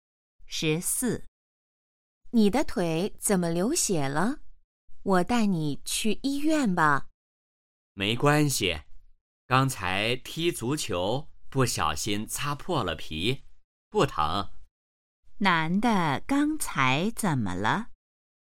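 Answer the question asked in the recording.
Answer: 踢足球时擦破了腿上的皮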